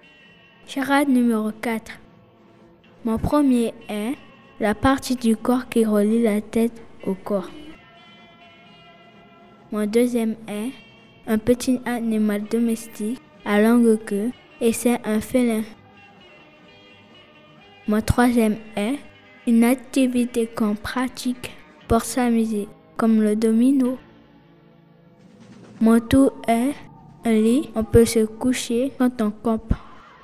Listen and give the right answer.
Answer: couchage.